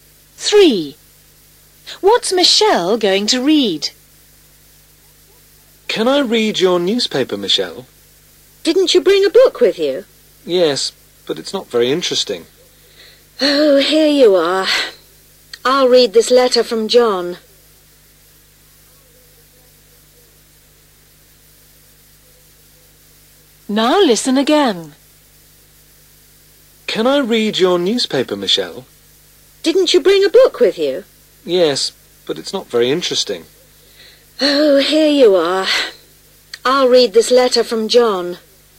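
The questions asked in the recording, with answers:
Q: What's Michelle going to read?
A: a letter from John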